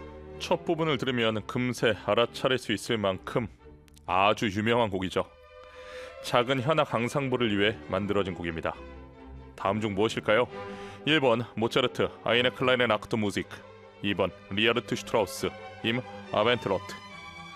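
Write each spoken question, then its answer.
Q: 작은 현악 앙상블을 위해 만들어진 곡입니다. 다음 중 무엇일까요?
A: 1번: 모차르트 아이네 클라인 악트 무직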